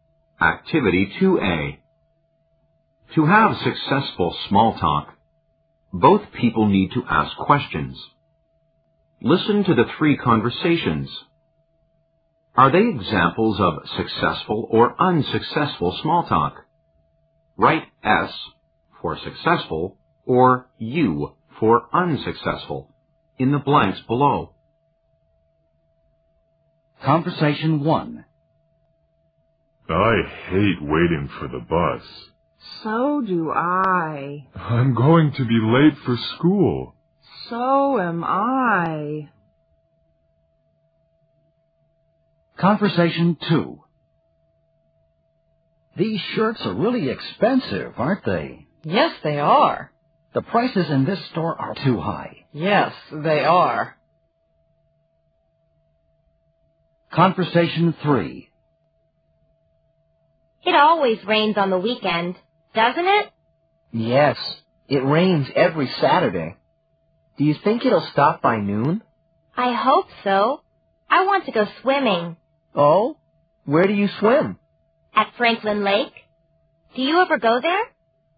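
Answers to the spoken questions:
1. U: unsuccessful
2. U: unsuccessful
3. S: successful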